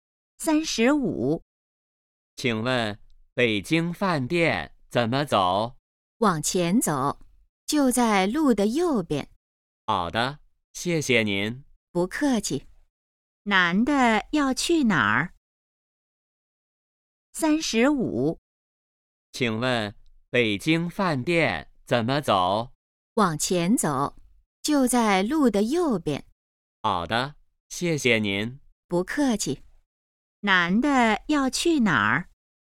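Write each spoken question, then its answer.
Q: 男的要去哪儿?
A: 北京饭店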